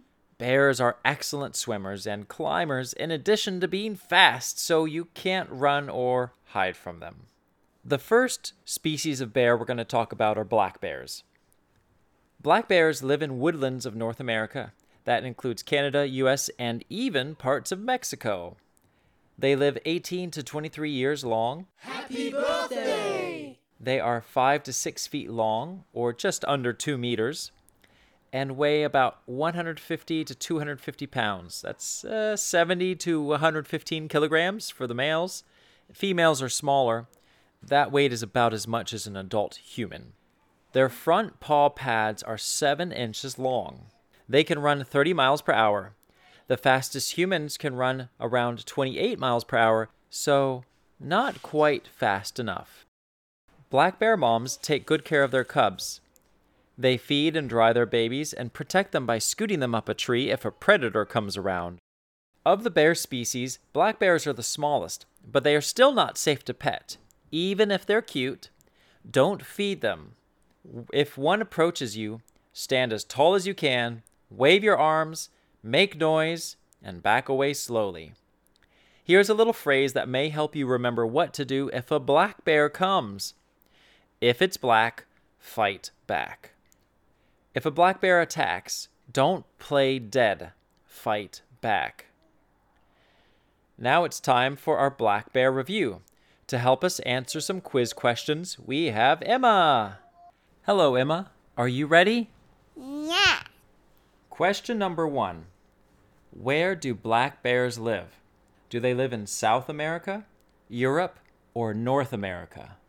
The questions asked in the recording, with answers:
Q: Where do black bears live? Do they live in South America, Europe, or North America?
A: North America is the answer.